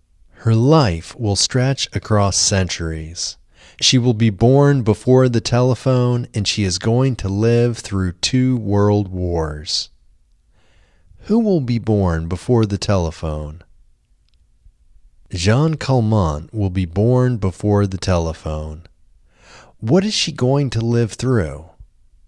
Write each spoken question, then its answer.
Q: What is she going to live through?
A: She is going to live through two world wars.